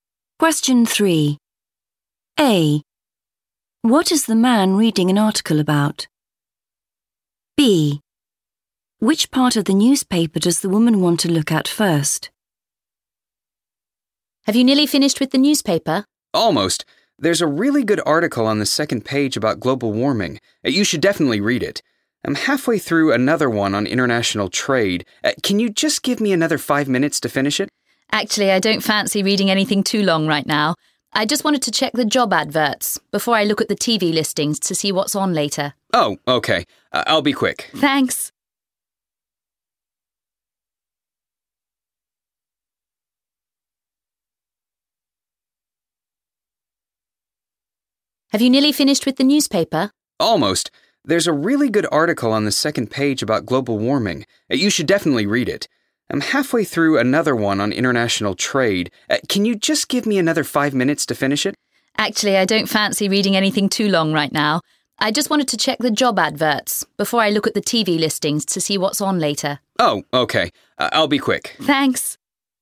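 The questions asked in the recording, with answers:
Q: What is the man reading an article about?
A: international trade

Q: Which part of the newspaper does the woman want to look at first?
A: the job adverts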